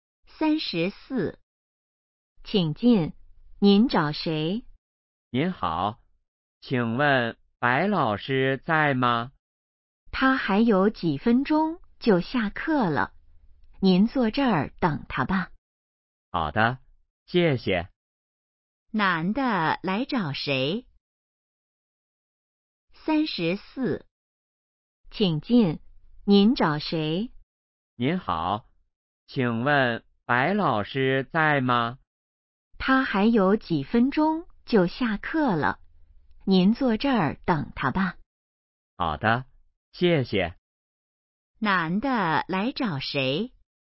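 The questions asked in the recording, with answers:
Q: 男的来找谁?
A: 白老师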